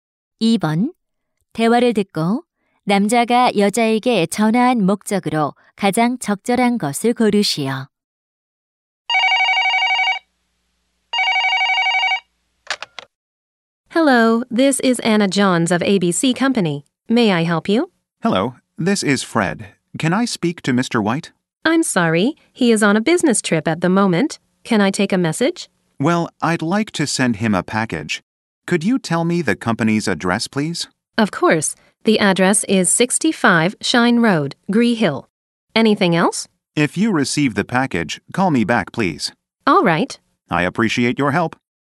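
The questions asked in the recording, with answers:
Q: 대화를 듣고 남자가 여자에게 전화한 목적으로 가장 적절한 것을 고르시오.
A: 소포를 보낼 회사 주소를 물어보려고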